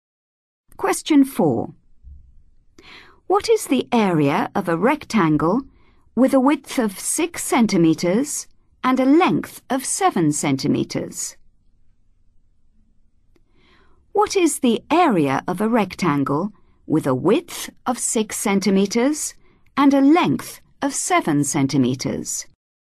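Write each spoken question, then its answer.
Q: What is the area of a rectangle with a width of 6 centimeters and a length of 7 centimeters?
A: 42 cm2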